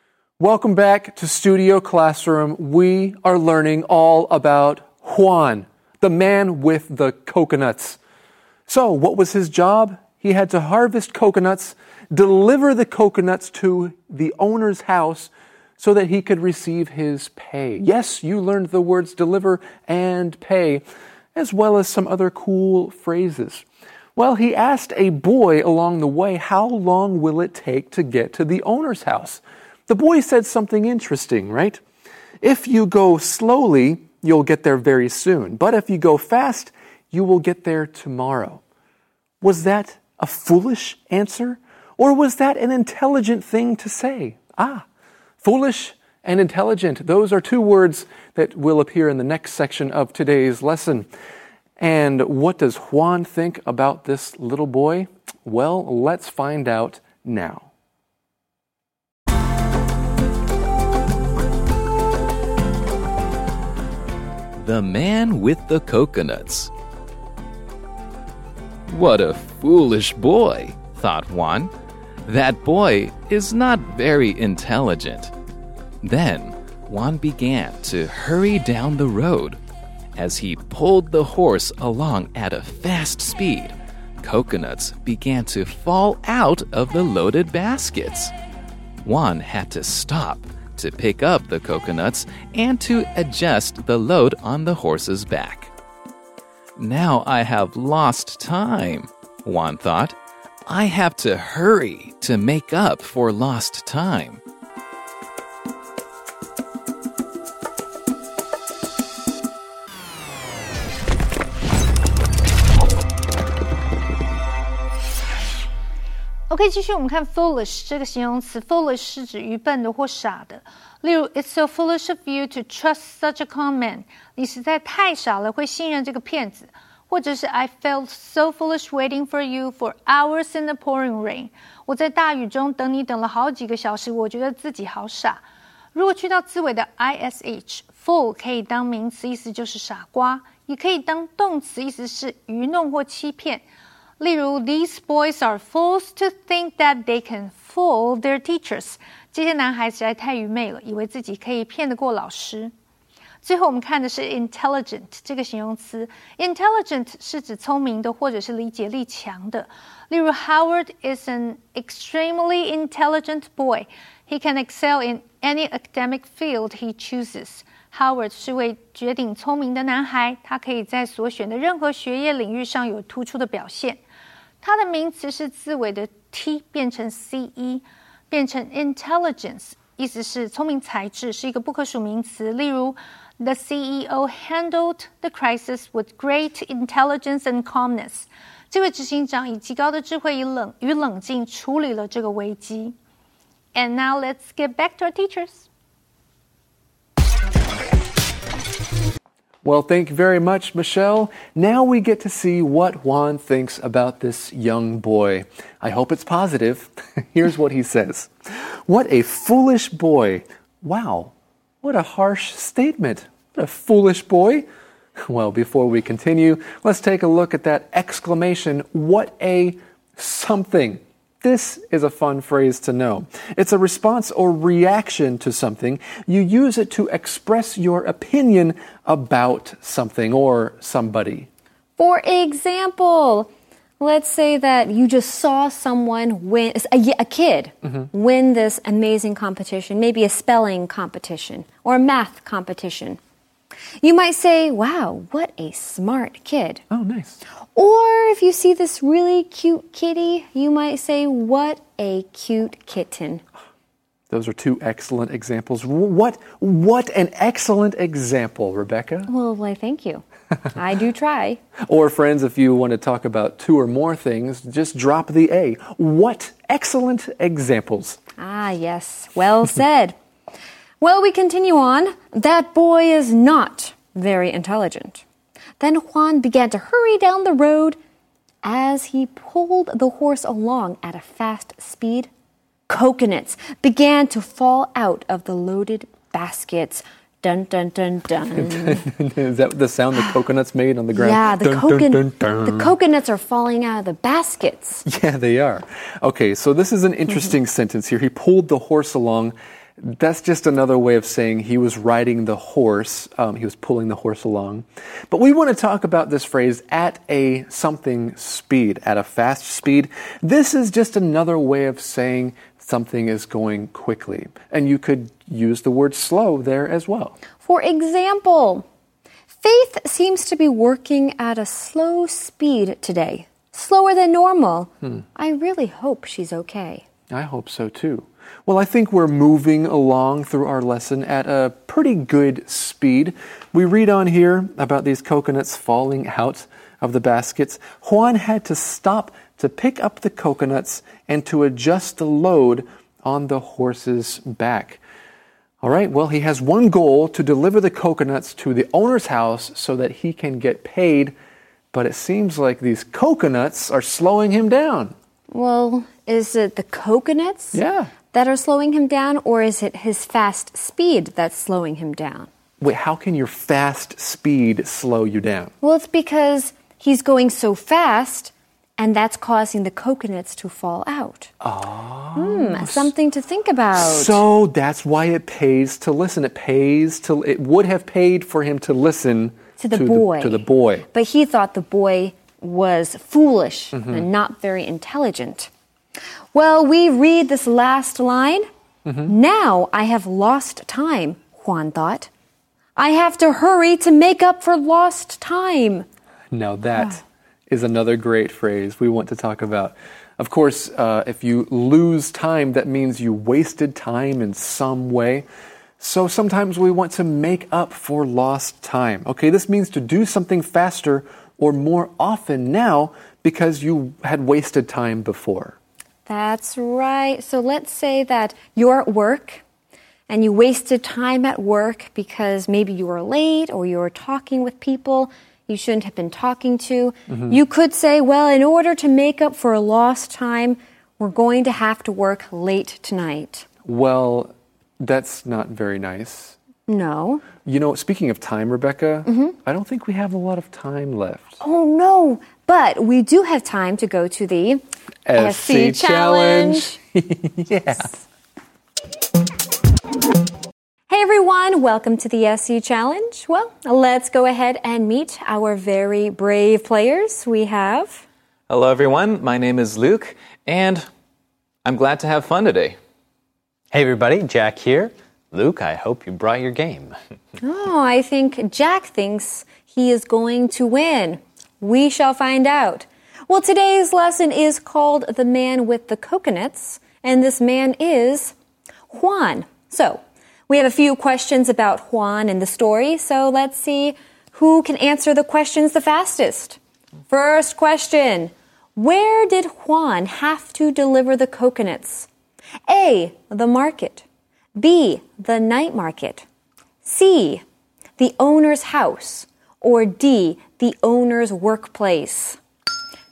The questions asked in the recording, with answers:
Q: First question, where did Juan have to deliver the coconuts? A, the market. B, the night market. C, the owner's house. Or D, the owner's workplace.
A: I think he was trying to deliver them to the owner's house.